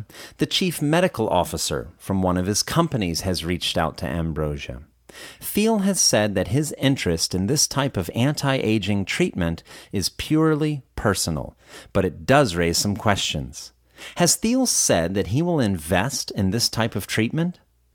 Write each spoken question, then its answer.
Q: Has Thiel said that he will invest in this type of treatment?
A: No, Thiel hasn't said that he will invest in this type of treatment.